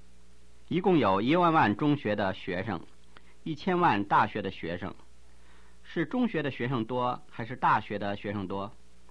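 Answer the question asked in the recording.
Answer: 中学的学生多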